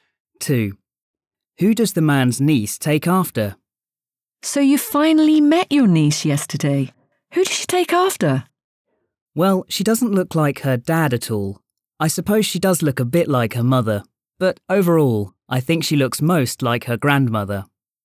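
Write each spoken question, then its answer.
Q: Who does the man's niece take after?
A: Her grandmother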